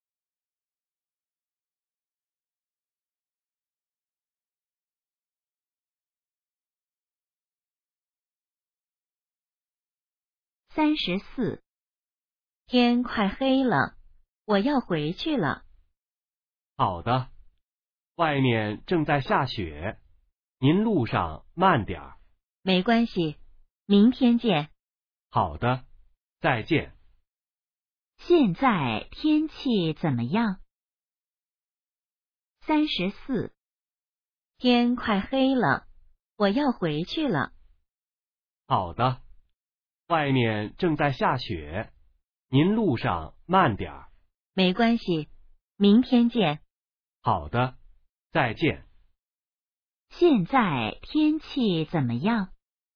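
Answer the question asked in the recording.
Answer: 正在下雪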